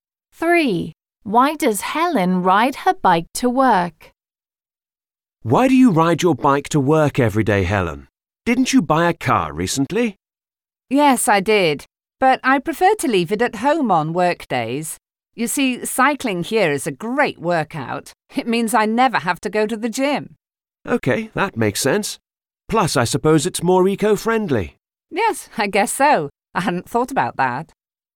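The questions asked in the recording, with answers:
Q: Why does Helen ride her bike to work?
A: It's a great workout, so she doesn't need the gym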